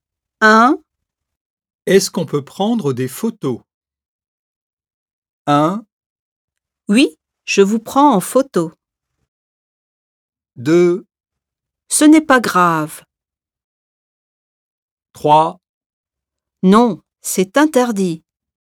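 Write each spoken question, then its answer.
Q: Est-ce qu'on peut prendre des photos?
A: 3: Non, c'est interdit.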